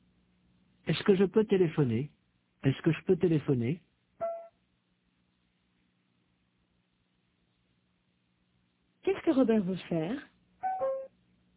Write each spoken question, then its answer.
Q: Qu'est-ce que Robert veut faire ?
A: Il veut téléphoner.